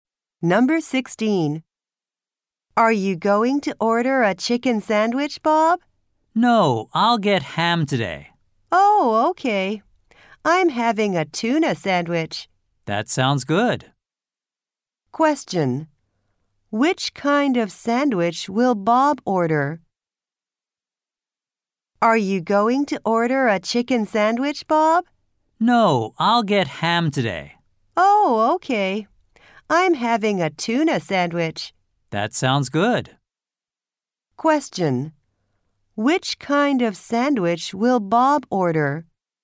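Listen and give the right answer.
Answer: Ham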